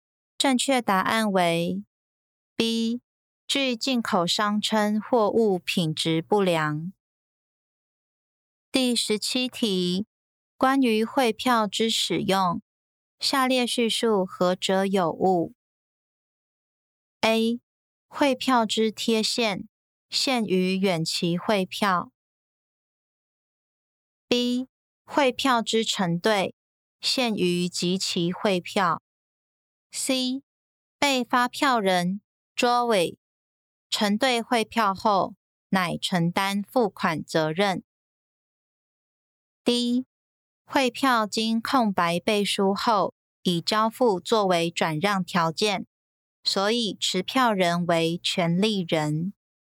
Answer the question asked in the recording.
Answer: 正确答案为 B. 汇票之成对限于集齐汇票。